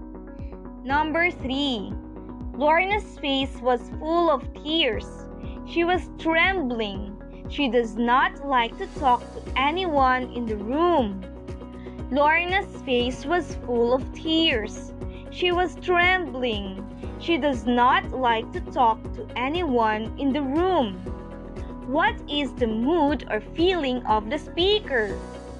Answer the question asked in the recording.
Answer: Yes, the speaker's mood or feeling is sad.